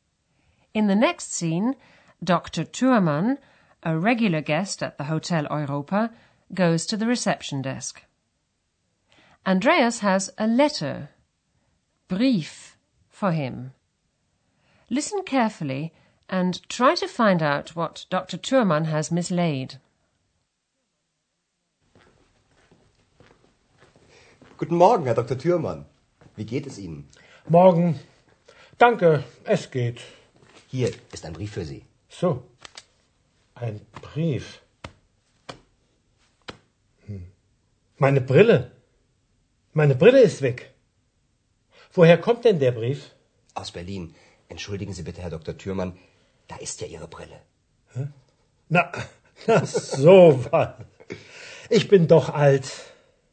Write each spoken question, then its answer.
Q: Listen carefully and try to find out what Dr. Thurmann has mislaid.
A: He looks for them, but he can't find them.